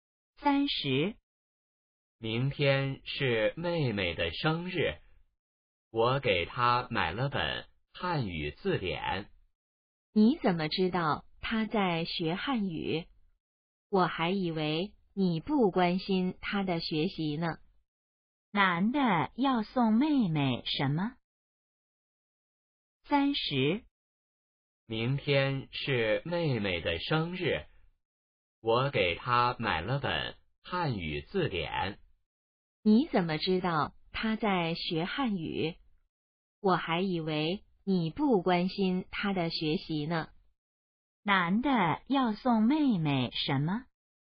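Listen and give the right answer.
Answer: 汉语字典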